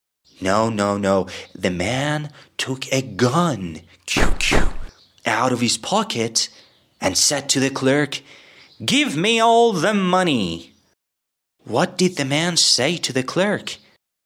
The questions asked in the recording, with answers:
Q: What did the man say to the clerk?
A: He said, "Give me all the money."